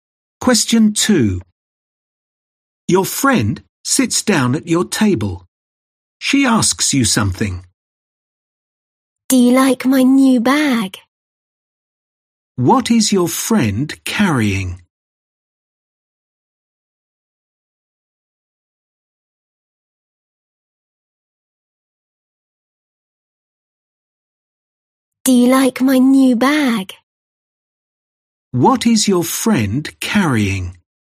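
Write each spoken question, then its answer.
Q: What is your friend carrying?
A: A new bag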